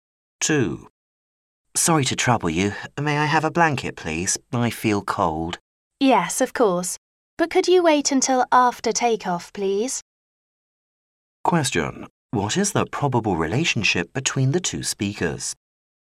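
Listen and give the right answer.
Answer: Passenger and flight attendant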